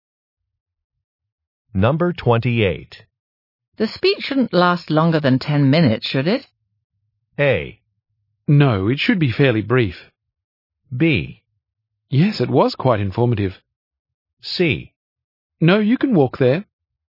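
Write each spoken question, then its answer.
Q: The speech shouldn't last longer than 10 minutes, should it?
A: A: No, it should be fairly brief.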